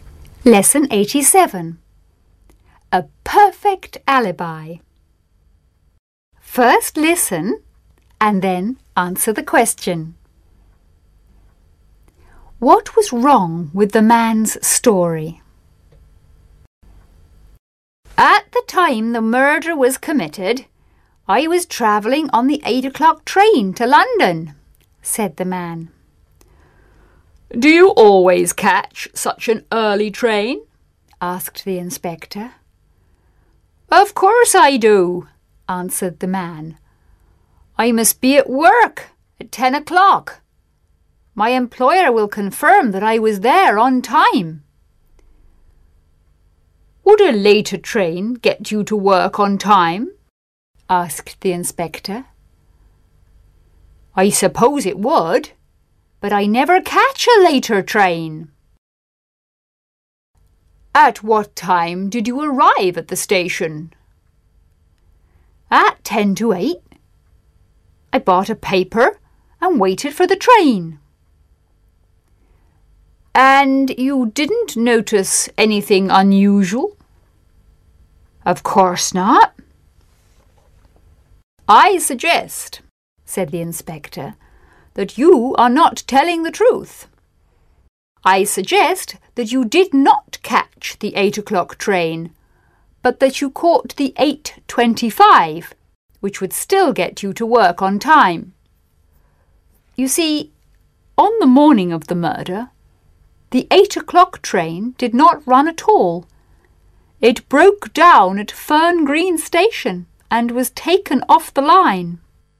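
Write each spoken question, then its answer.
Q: What was wrong with the man's story?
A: He said he caught the 8 o'clock train, but that train did not run that morning because it broke down at Fern Green Station.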